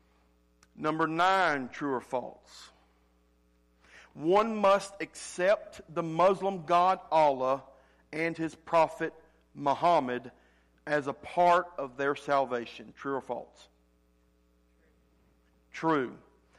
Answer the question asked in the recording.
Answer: True.